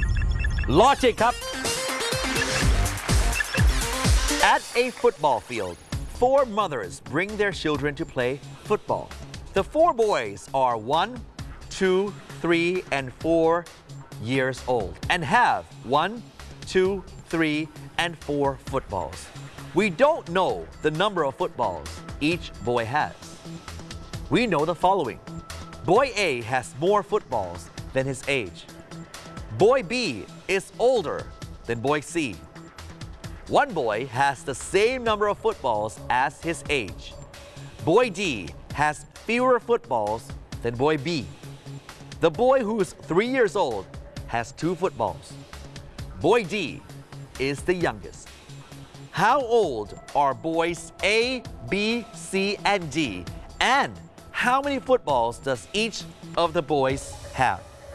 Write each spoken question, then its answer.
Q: How old are boys A, B, C, and D?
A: A is a 2 years old boy and has 4 footballs.

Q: And how many footballs does each of the boys have?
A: B is 4 years old and has 3 footballs.